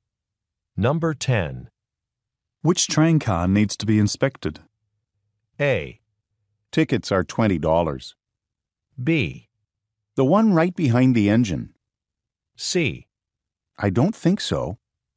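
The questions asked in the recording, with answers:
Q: Which train car needs to be inspected?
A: B: The one right behind the engine.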